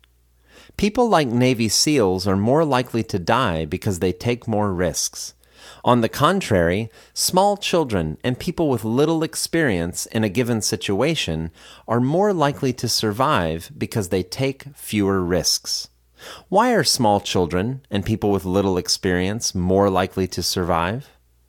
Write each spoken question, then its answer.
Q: Why are small children and people with little experience more likely to survive?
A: Small children and people with little experience are more likely to survive because they take fewer risks.